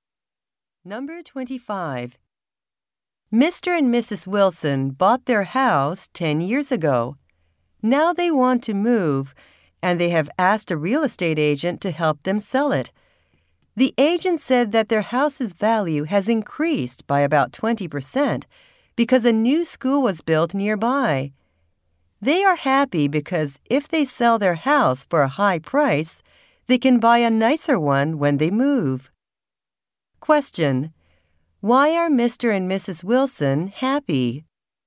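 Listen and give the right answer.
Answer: Their house's value has increased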